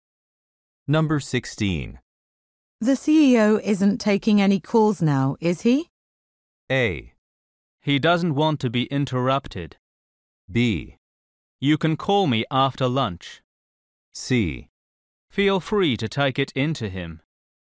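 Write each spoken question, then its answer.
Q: The CEO isn't taking any calls now, is he?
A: A: He doesn't want to be interrupted.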